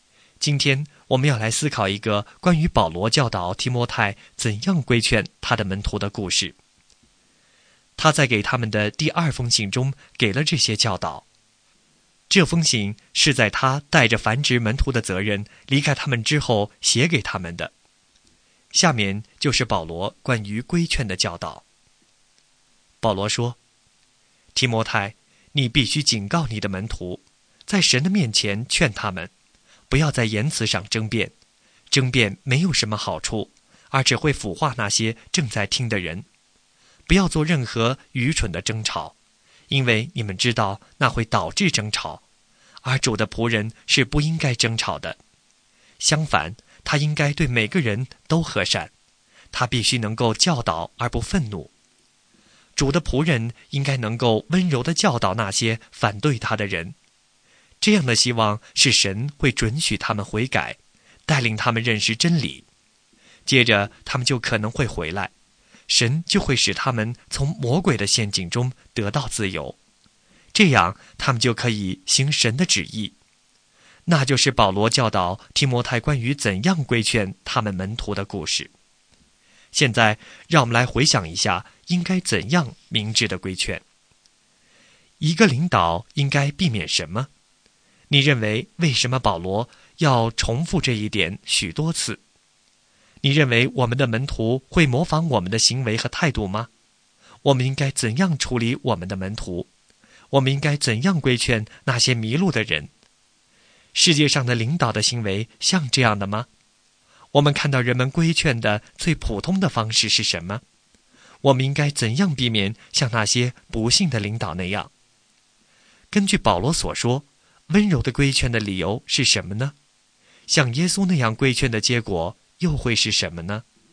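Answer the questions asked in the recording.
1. 避免在言辞上争辩和愚蠢的争吵
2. 对每个人和善,温柔地教导而不愤怒
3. 希望神准许他们悔改、认识真理,从魔鬼的陷阱中得自由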